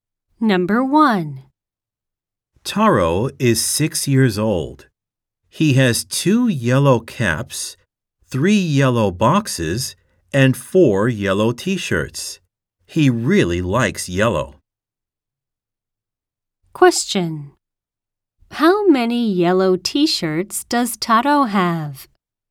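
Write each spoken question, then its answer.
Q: How many yellow t-shirts does Taro have?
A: Four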